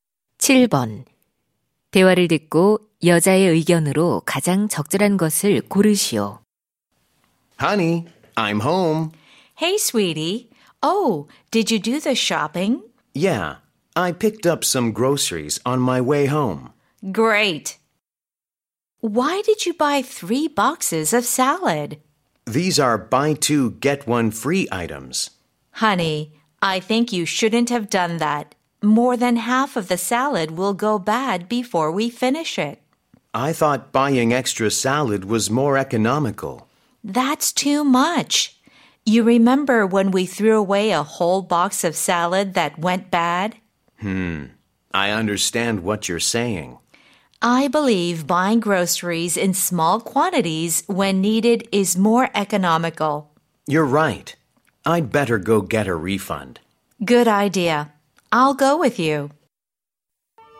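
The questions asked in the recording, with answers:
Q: 대화를 듣고 여자의 의견으로 가장 적절한 것을 고르시오.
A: 식료품은 필요할 때 소량으로 사는 것이 더 경제적이다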